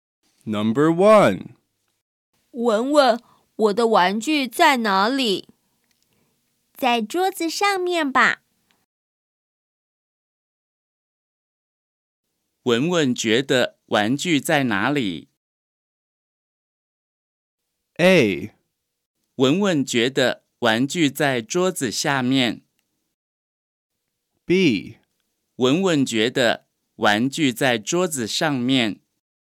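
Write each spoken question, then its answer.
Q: 文文觉得玩具在哪里?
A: B: 文文觉得玩具在桌子上面。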